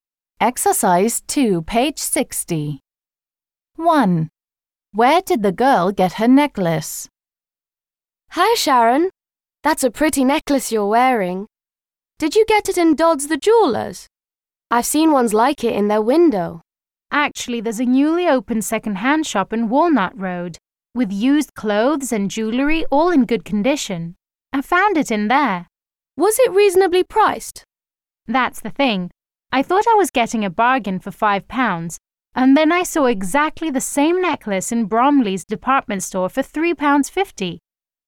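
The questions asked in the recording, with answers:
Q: Where did the girl get her necklace?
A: At a new second-hand shop in Walnut Road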